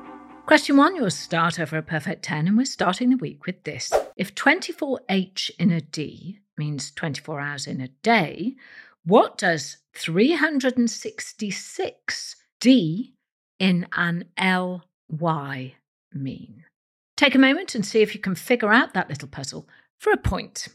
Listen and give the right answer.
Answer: 366 days in a leap year.